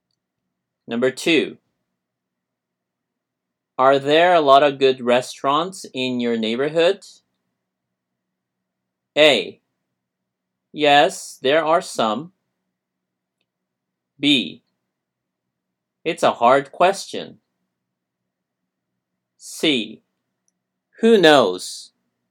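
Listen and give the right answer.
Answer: A: Yes, there are some.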